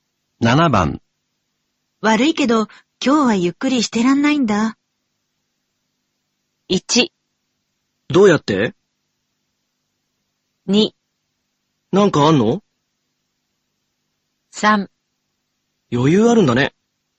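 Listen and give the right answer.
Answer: 2: なんかあんの?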